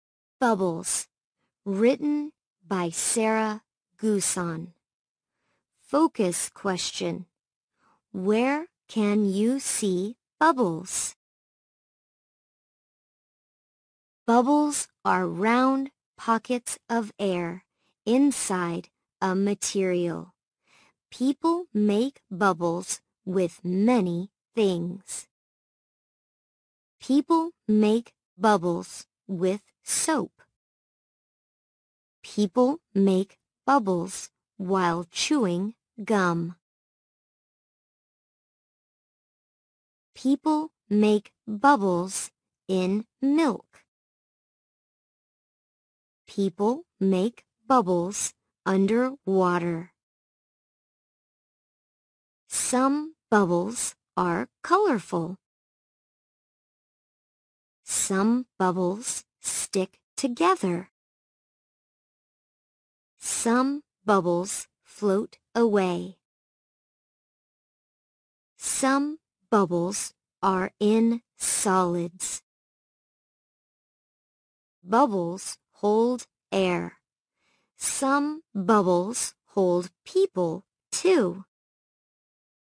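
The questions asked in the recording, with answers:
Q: Where can you see bubbles?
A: In soap, chewing gum, milk, under water and solids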